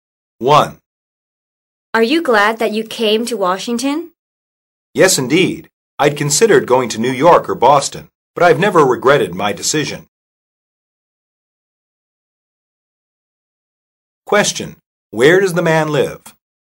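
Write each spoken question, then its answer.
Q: Where does the man live?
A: Washington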